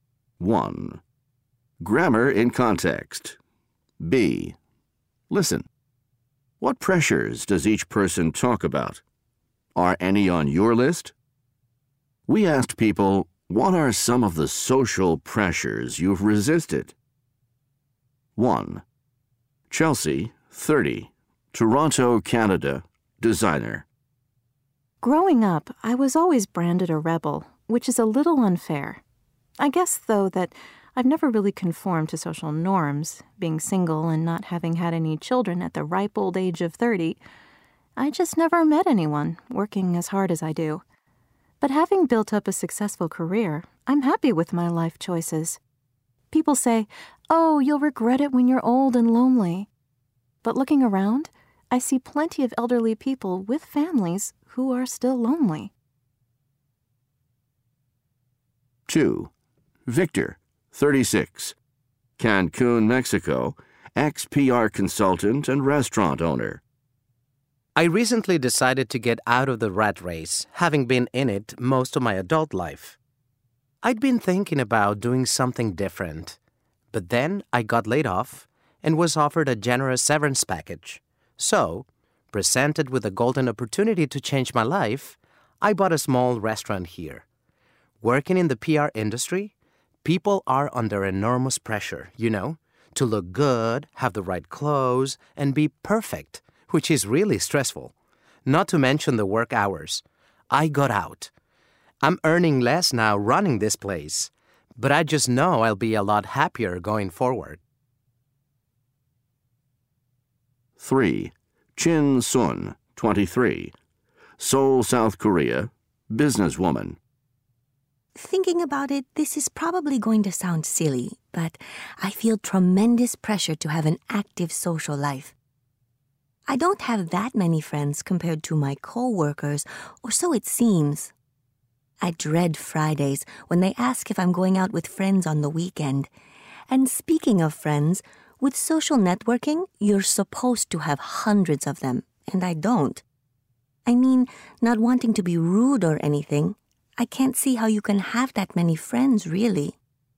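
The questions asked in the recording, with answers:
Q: What pressures does each person talk about?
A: Chelsea: pressure to conform, get married and have children; Victor: pressure in PR to look good, wear the right clothes, be perfect, and work long hours; Chin Sun: pressure to have an active social life and many friends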